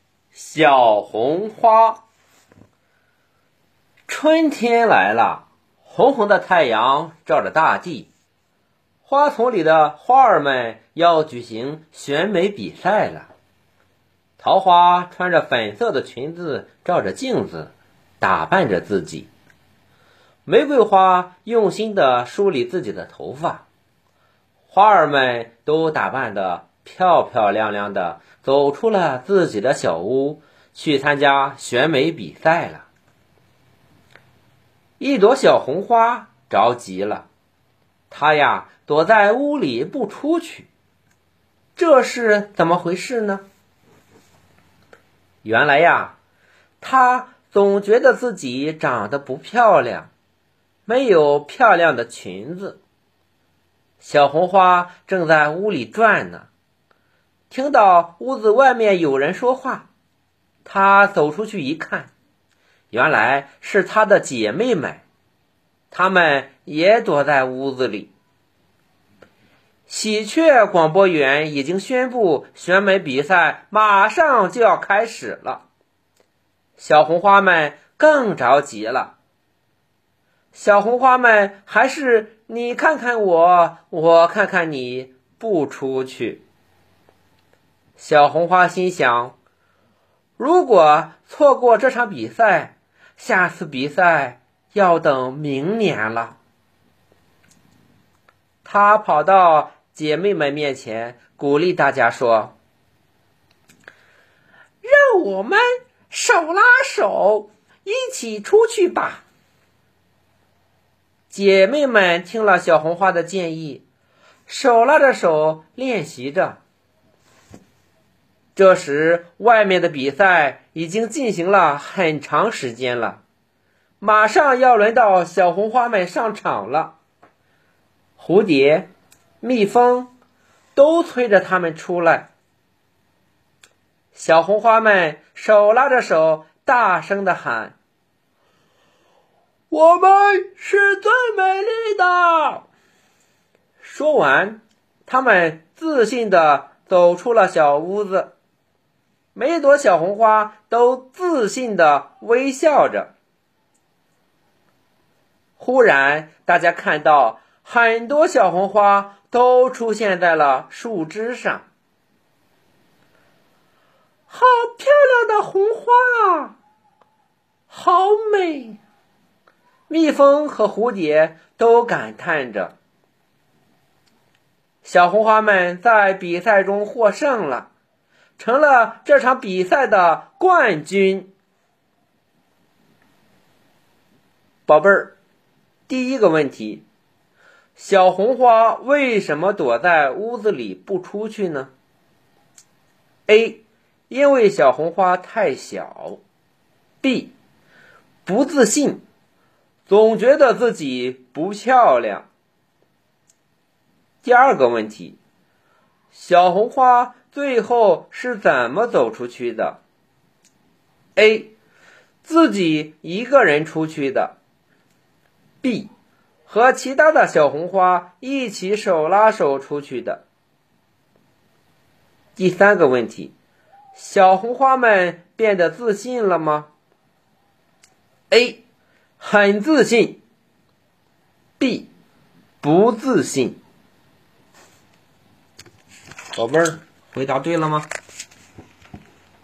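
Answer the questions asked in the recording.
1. B: 不自信,总觉得自己不漂亮
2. B: 和其他的小红花一起手拉手出去的
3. A: 很自信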